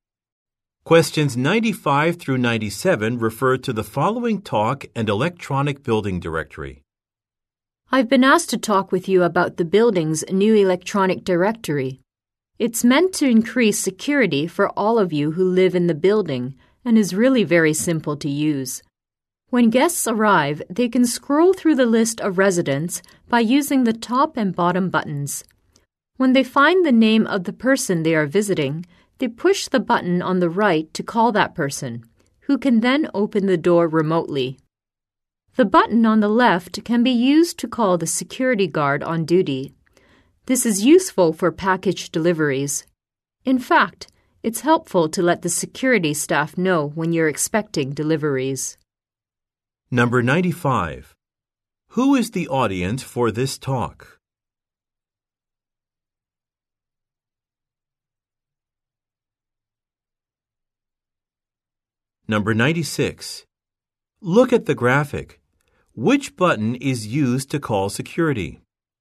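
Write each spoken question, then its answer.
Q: Who is the audience for this talk?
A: Building residents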